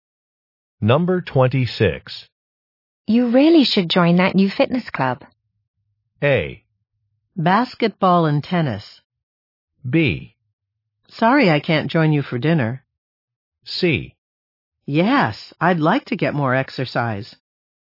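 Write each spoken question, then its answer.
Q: You really should join that new fitness club.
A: C: Yes, I'd like to get more exercise.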